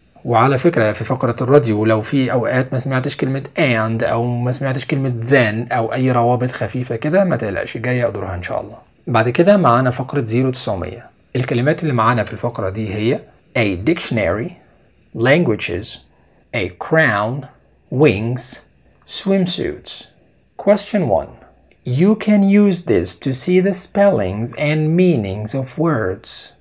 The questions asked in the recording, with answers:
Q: You can use this to see the spellings and meanings of words.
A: الإجابة a dictionary.